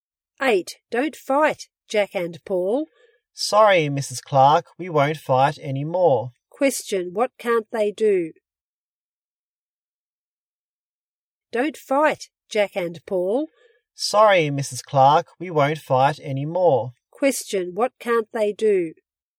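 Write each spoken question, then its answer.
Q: What can't they do?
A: Fight.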